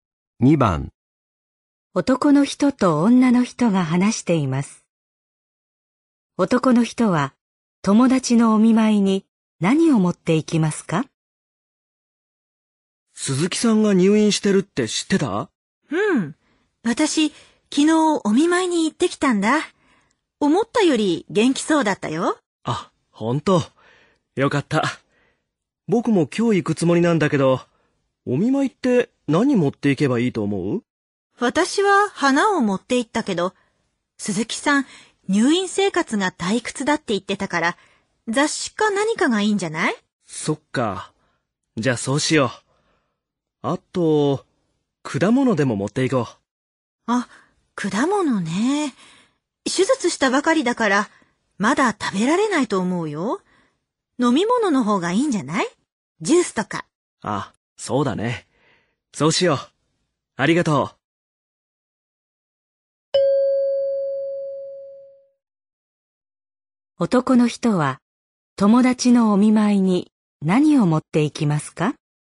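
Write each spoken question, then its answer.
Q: 男の人は友達のお見舞いに何を持っていきますか?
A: 雑誌とジュース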